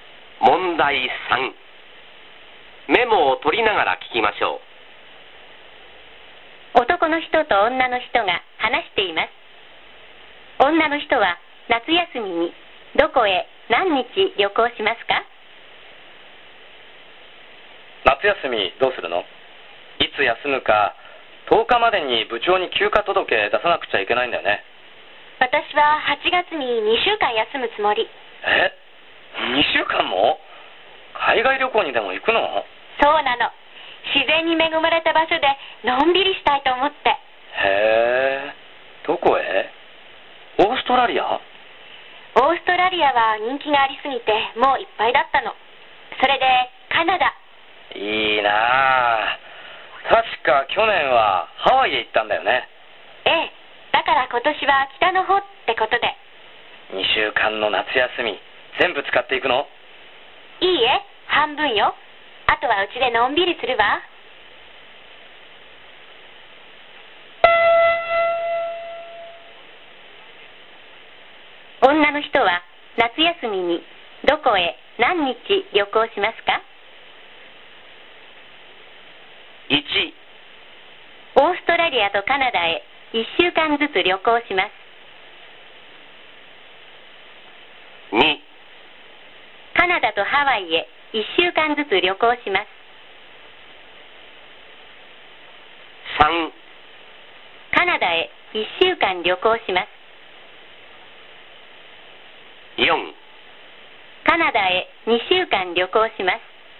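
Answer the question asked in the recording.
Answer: 3: カナダへ1週間旅行します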